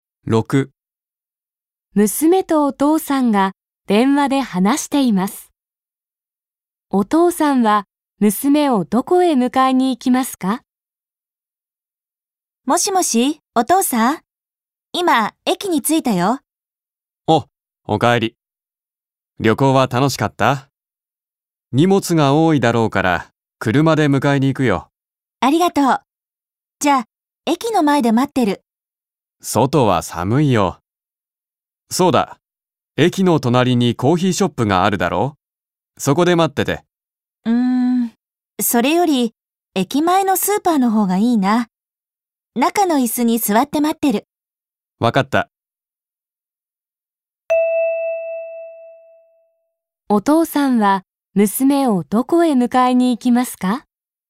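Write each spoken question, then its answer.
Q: お父さんは娘をどこへ迎えに行きますか?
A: 駅前のスーパー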